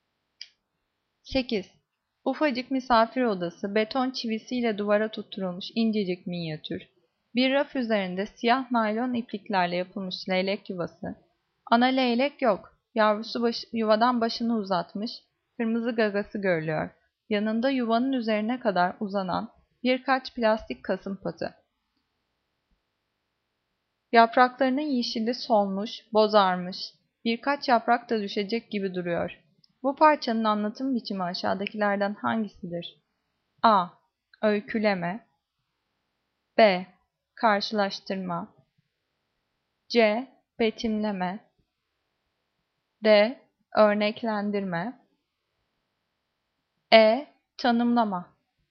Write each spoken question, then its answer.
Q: Bu parçanın anlatım biçimi aşağıdakilerden hangisidir?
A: Cevap C. Betimleme.